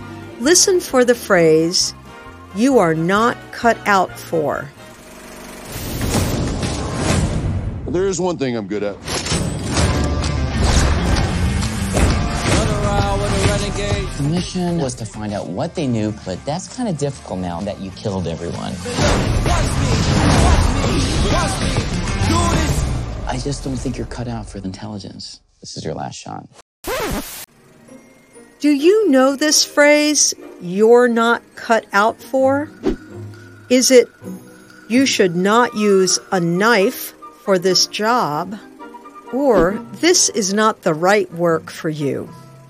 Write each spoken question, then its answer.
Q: Do you know this phrase, you're not cut out for?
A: You're not cut out for means this is not the right work for you.